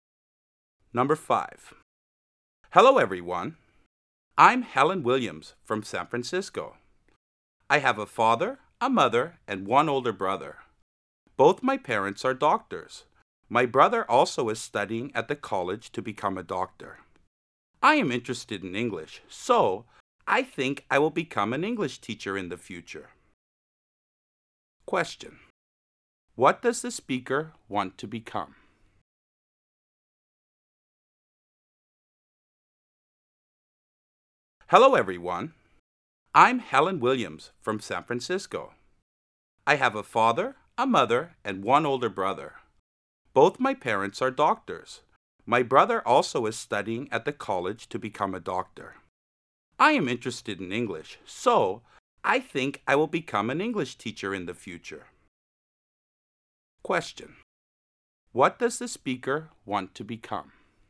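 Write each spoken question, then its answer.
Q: What does the speaker want to become?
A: An English teacher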